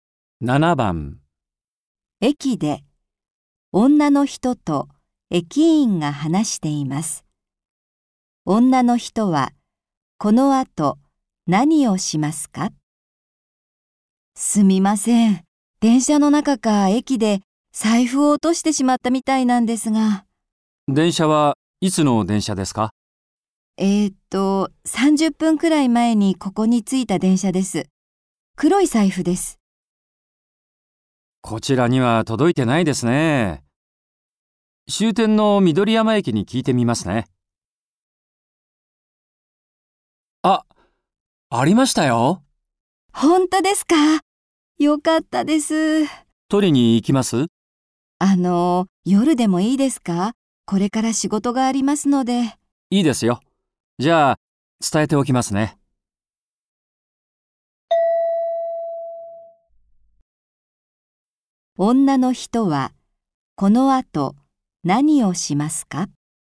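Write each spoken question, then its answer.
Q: 女の人はこのあと何をしますか?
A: 仕事に行く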